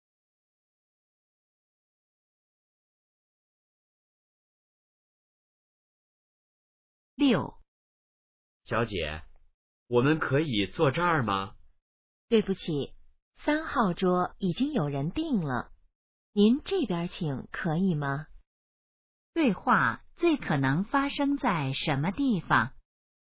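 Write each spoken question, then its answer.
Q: 对话最可能发生在什么地方?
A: 饭店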